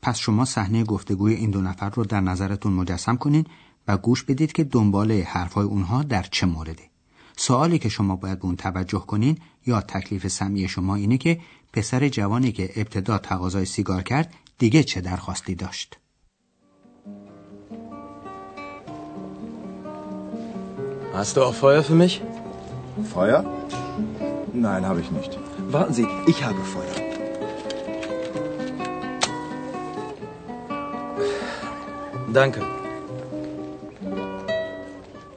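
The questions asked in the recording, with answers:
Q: پسر جوانی که ابتدا تقاضای سیگار کرد دیگه چه درخواستی داشت؟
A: آتش (کبریت یا فندک)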